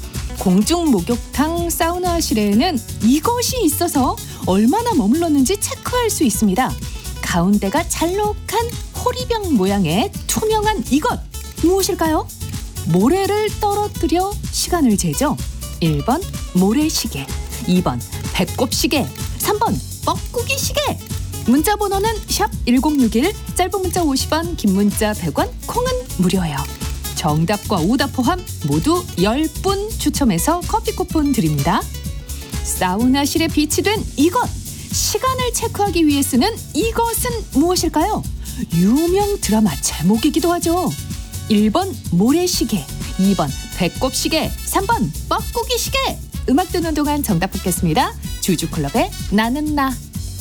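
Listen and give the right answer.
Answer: 1번: 모래시계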